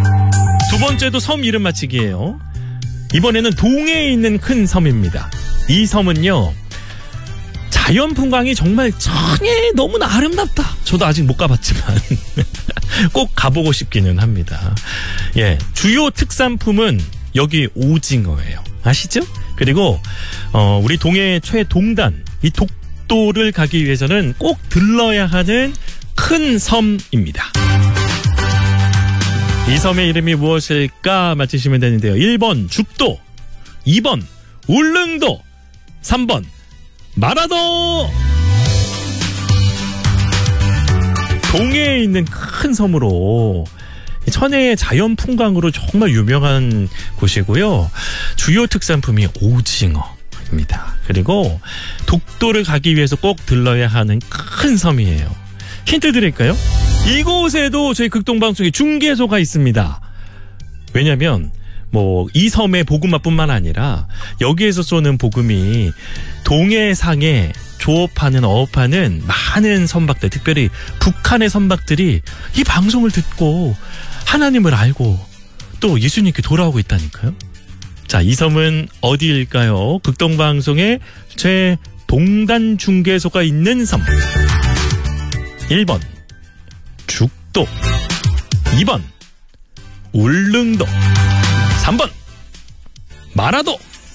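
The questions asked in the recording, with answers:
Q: 자, 이 섬은 어디일까요? 극동방송의 최동단 중계소가 있는 섬.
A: 2번: 울릉도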